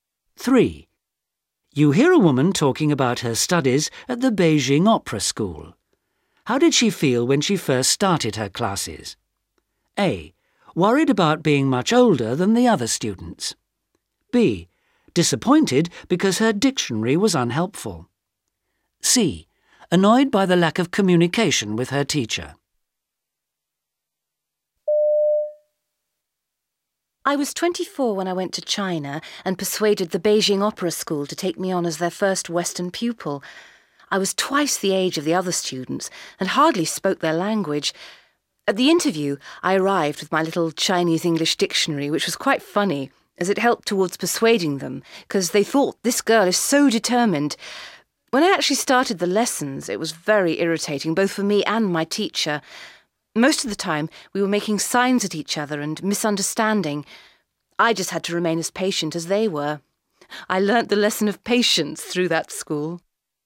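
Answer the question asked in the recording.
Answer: C: Annoyed by the lack of communication with her teacher.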